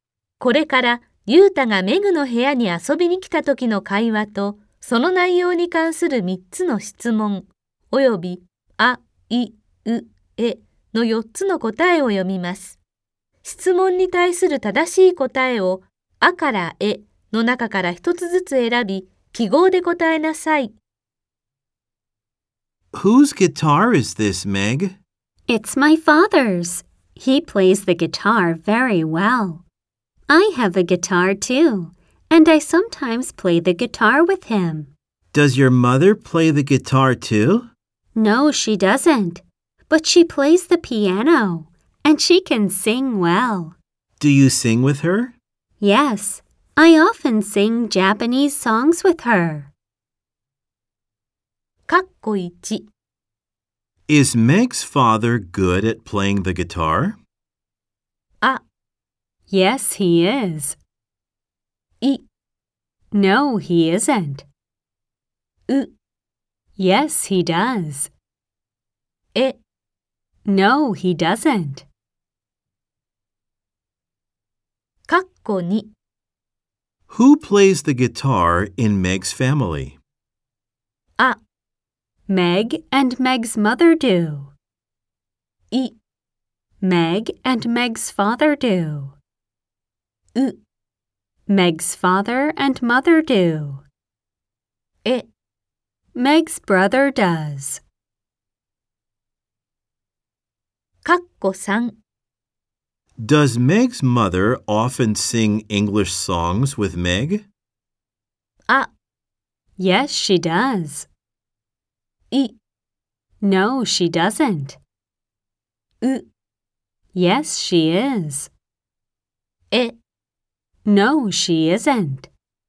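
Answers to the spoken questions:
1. あ: Yes, he is.
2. い: Meg and Meg's father do.
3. い: No, she doesn't.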